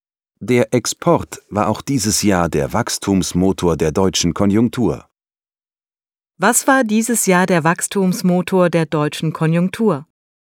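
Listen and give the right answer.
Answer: Der Export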